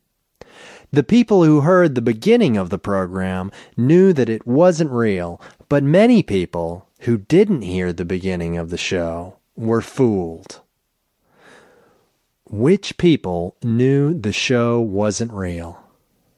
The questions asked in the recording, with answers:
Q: Which people knew the show wasn't real?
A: The people who heard the beginning of the program knew it wasn't real.